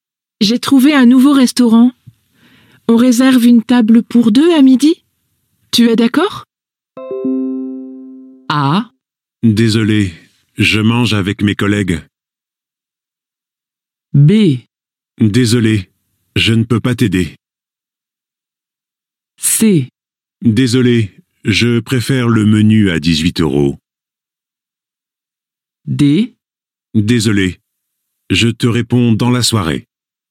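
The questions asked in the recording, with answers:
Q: Tu es d'accord?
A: A: Désolé, je mange avec mes collègues.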